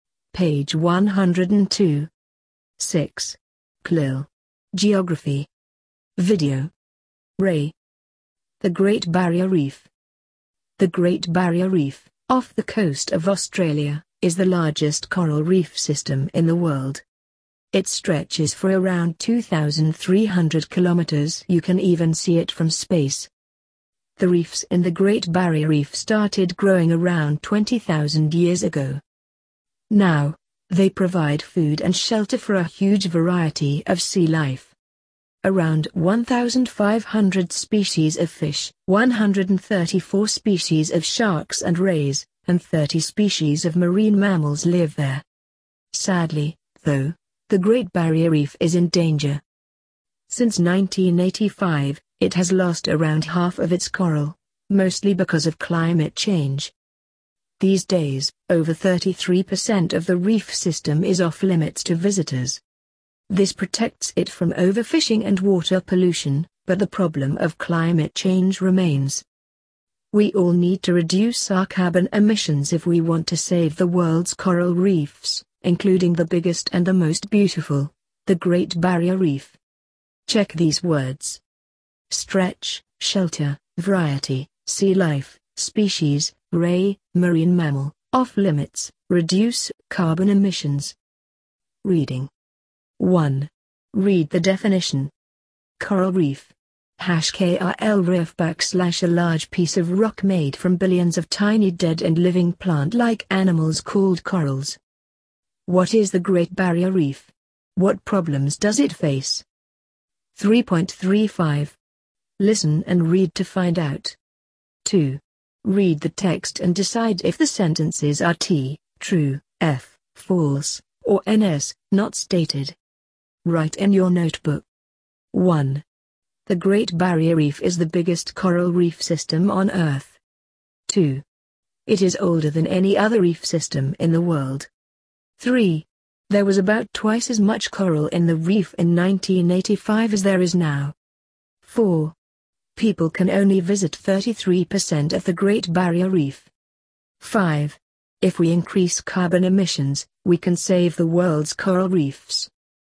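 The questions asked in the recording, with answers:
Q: The Great Barrier Reef is the biggest coral reef system on Earth.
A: T: true

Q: It is older than any other reef system in the world.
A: NS: not stated

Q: There was about twice as much coral in the reef in 1985 as there is now.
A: T: true

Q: People can only visit 33% of the Great Barrier Reef.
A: F: false

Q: If we increase carbon emissions, we can save the world's coral reefs.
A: F: false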